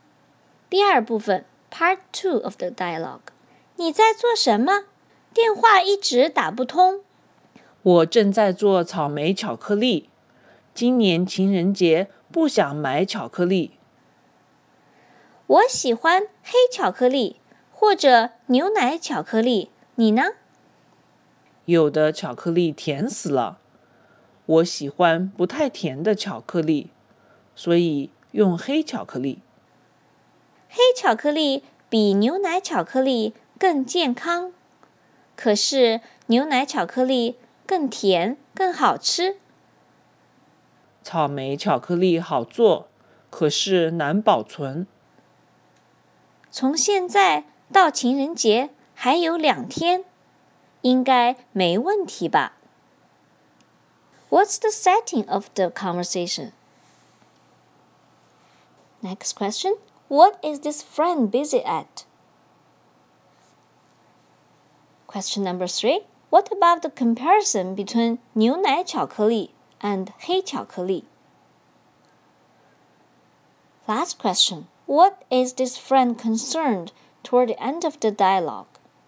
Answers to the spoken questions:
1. It is a conversation over the phone.
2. I'm making chocolate-covered strawberry right now.
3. Dark chocolate is healthier than milk chocolate, while milk chocolate is sweeter and tastes better.
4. She's concerned if the strawberry will be spoiled.